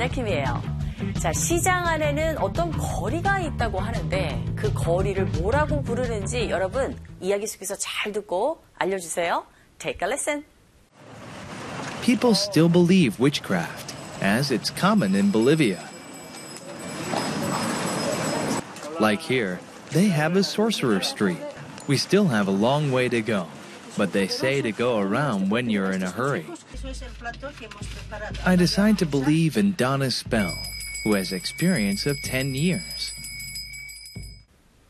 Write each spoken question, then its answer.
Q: 자, 시장 안에는 어떤 거리가 있다고 하는데 그 거리를 뭐라고 부르는지 여러분 이야기 속에서 잘 듣고 알려주세요.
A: Sorcerer Street, 이게 뭘까요?